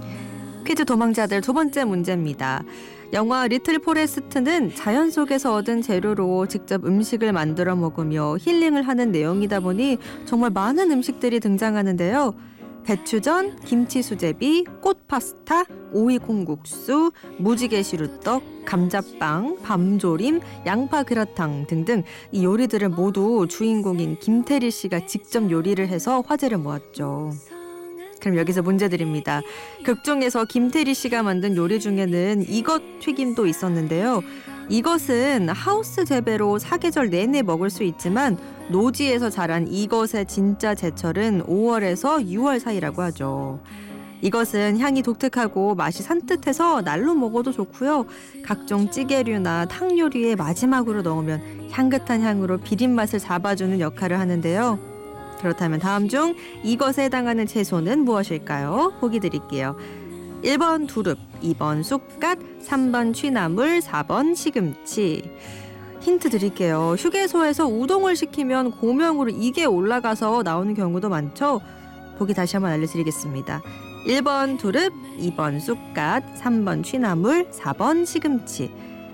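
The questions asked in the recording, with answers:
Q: 그렇다면 다음 중 이것에 해당하는 채소는 무엇일까요?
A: 2: 쑥갓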